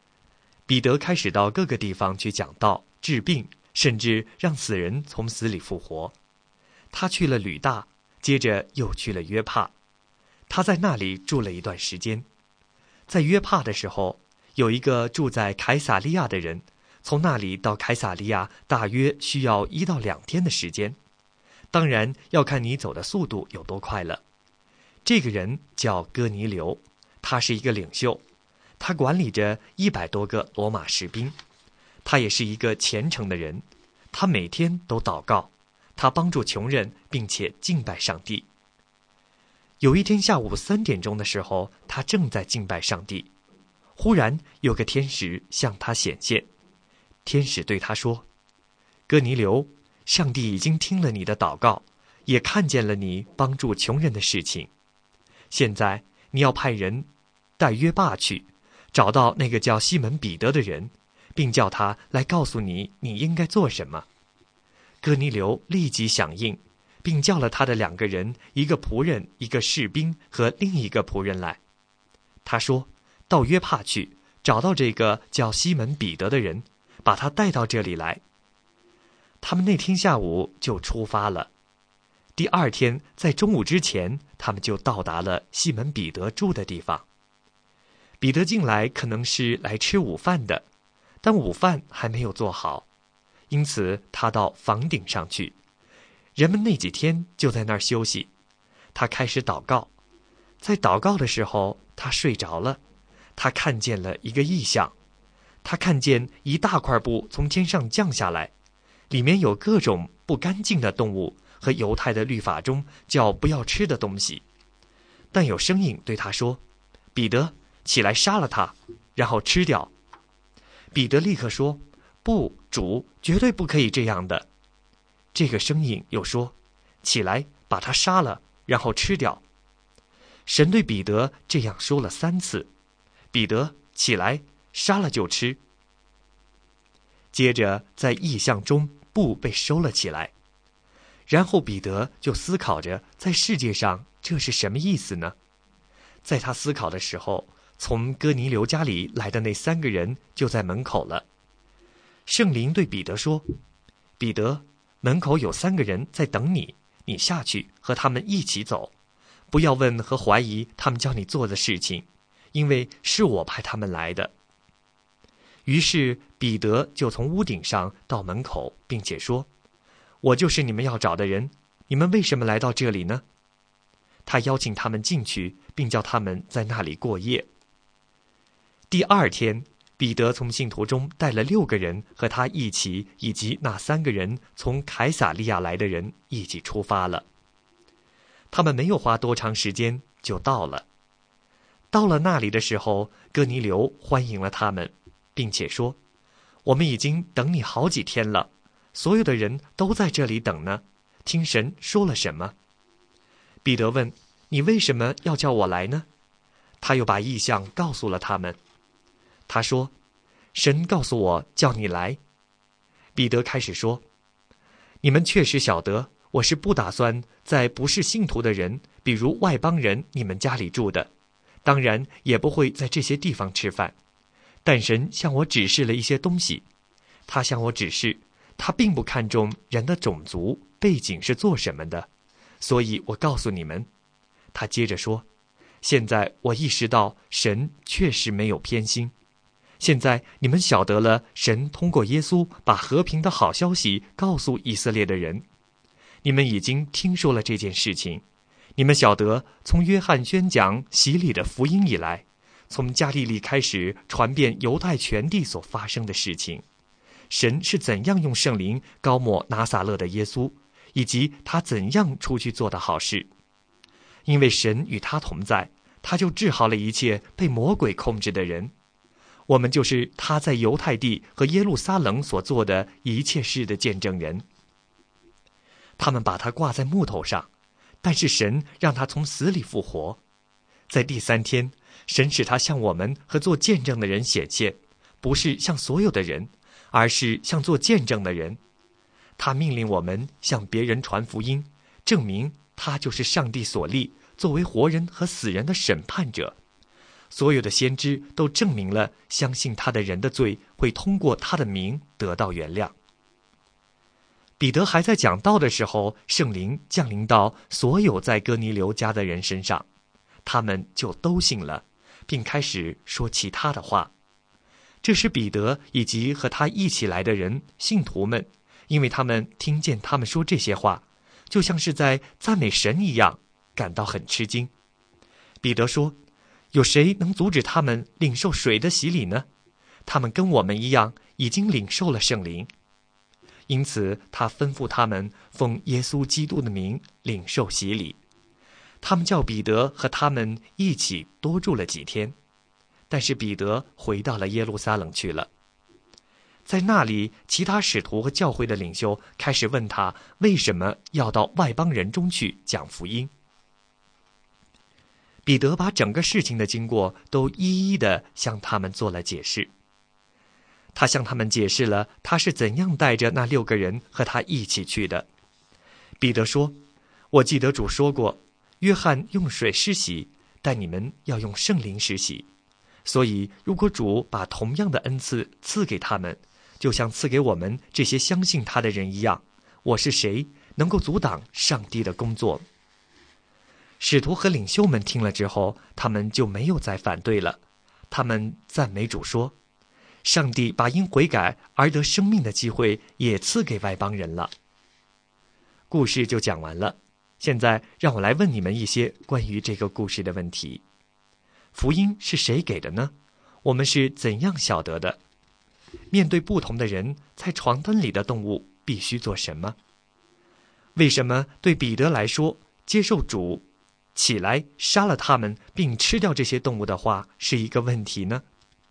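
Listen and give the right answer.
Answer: 因为这些是不干净的动物,犹太律法规定不可以吃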